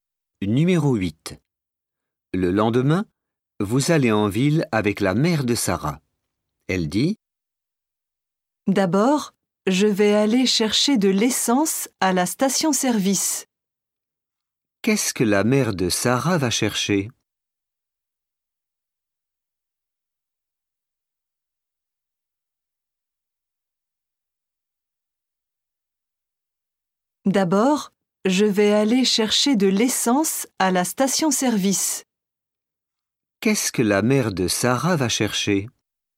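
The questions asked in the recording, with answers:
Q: Qu'est-ce que la mère de Sarah va chercher?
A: De l'essence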